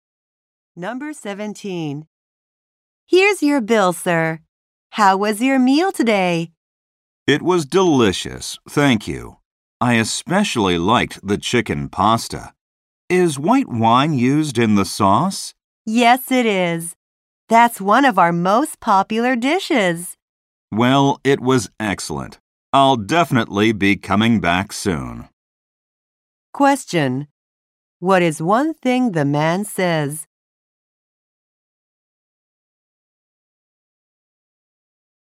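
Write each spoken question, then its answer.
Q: What is one thing the man says?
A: He will definitely come back soon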